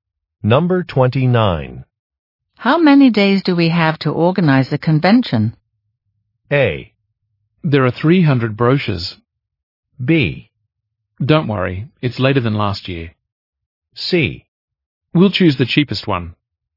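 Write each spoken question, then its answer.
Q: How many days do we have to organize the convention?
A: B: Don't worry, it's later than last year.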